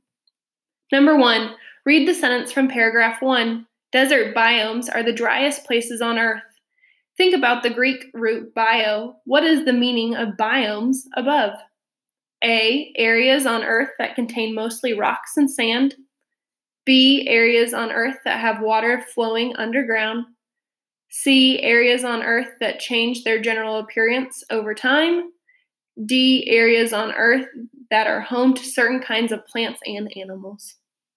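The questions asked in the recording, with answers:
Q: What is the meaning of biomes above?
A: D: areas on Earth that are home to certain kinds of plants and animals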